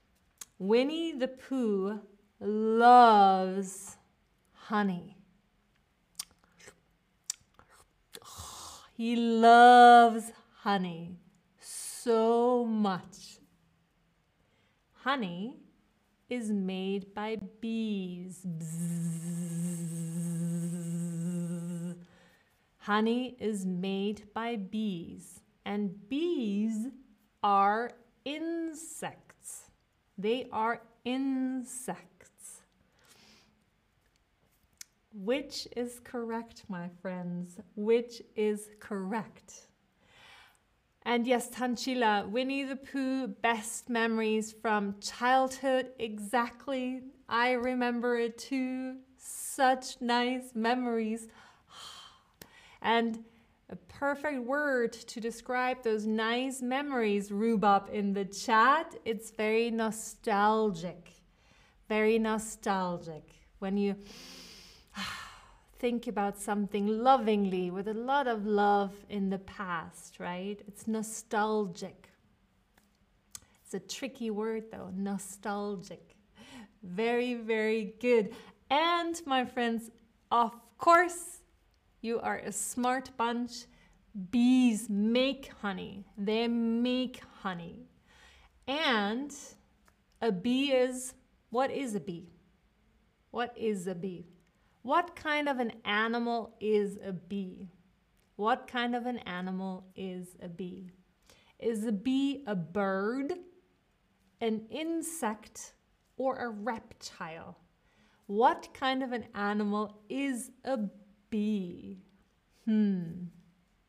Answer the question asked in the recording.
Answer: A bee is an insect.